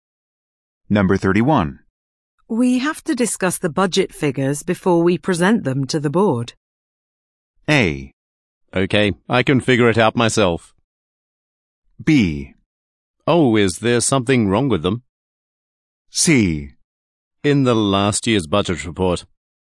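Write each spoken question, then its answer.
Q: We have to discuss the budget figures before we present them to the board.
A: B: Oh, is there something wrong with them?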